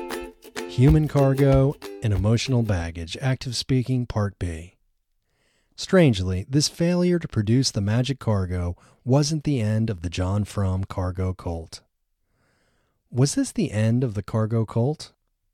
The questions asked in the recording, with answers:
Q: Was this the end of the cargo cult?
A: No, this wasn't the end of the cargo cult.